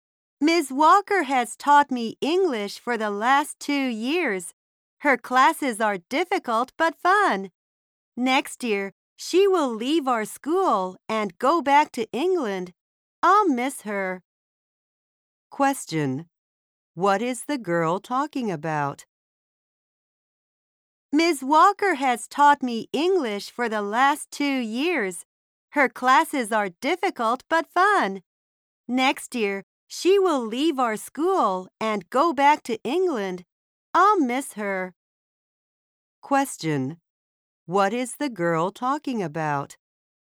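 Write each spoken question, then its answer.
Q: What is the girl talking about?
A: Her English teacher, Ms. Walker, who will leave the school next year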